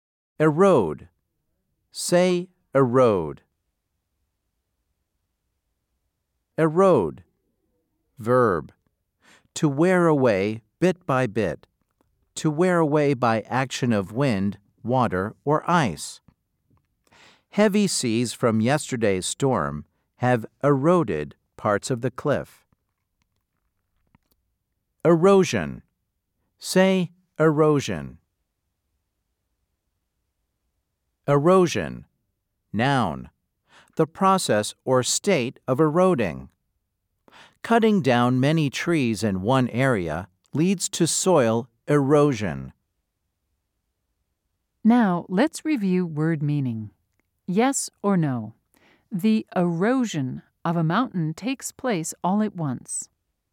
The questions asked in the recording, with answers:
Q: Yes or no? The erosion of a mountain takes place all at once.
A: If you said no, you were correct.